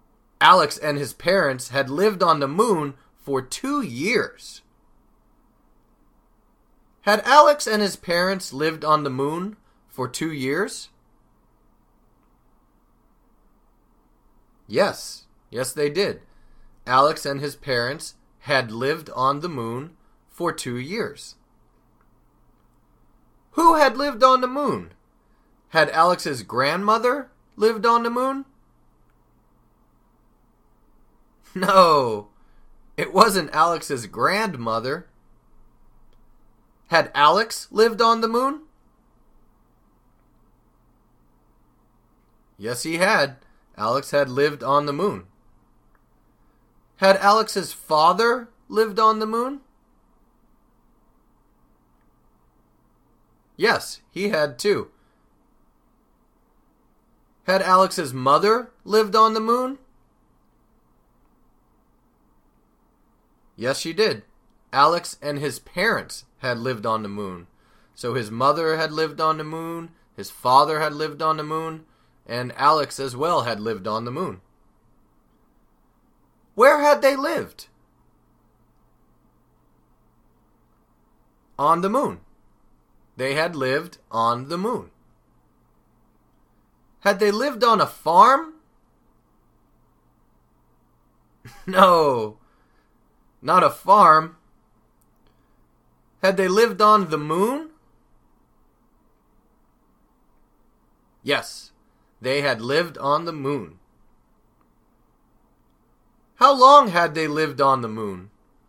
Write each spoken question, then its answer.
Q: How long had they lived on the moon?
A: 2 years. They had lived on the moon for 2 years.